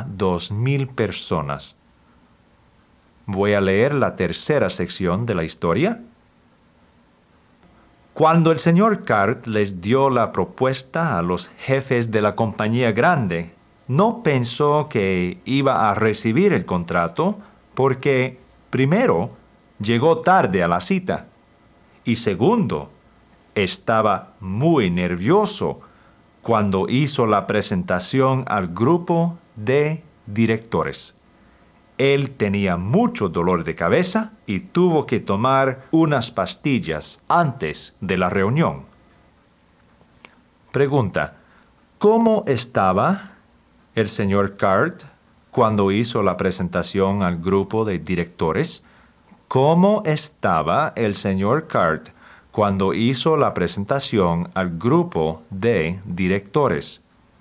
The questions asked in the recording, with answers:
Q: ¿cómo estaba el señor Cart cuando hizo la presentación al grupo de directores?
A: Él estaba muy nervioso.